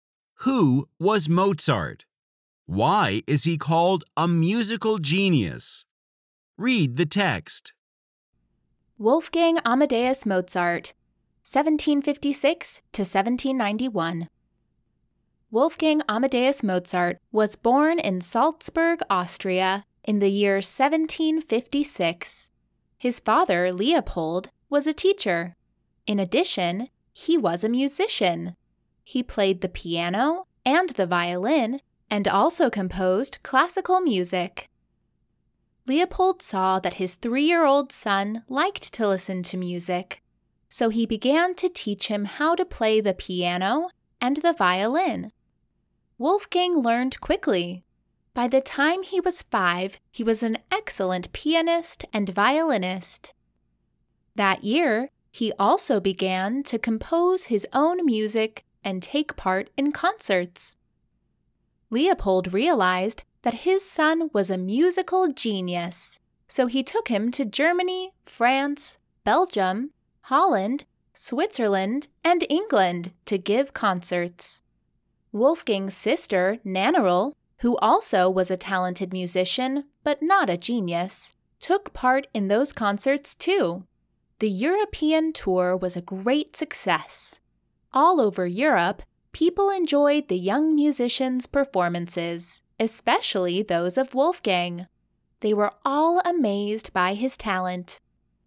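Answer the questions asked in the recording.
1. An Austrian musician and composer, born in Salzburg in 1756
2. By age five he was an excellent pianist and violinist and began composing his own music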